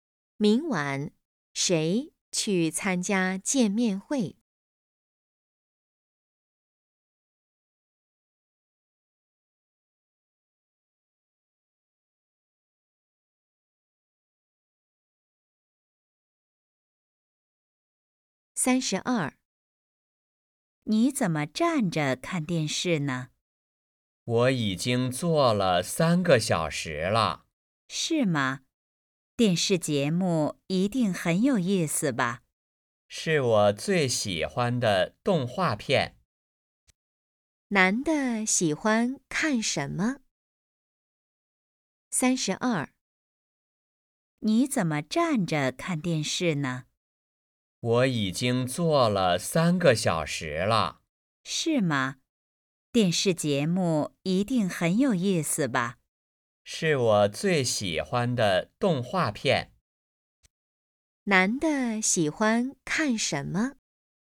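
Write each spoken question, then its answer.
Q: 男的喜欢看什么?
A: 动画片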